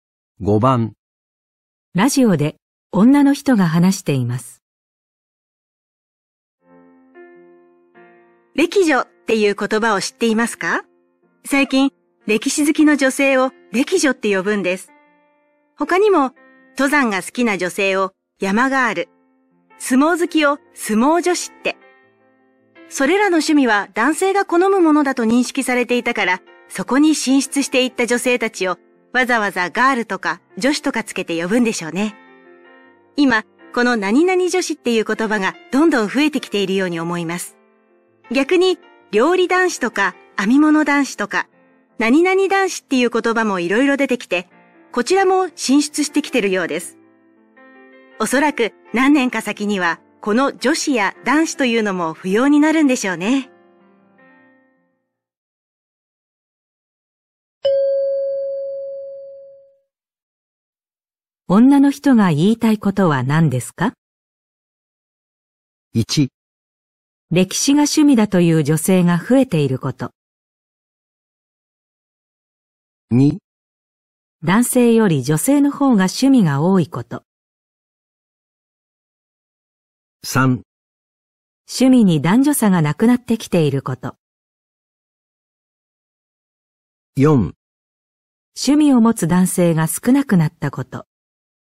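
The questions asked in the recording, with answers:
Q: 女の人が言いたいことは何ですか?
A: 3: 趣味に男女差がなくなってきていること。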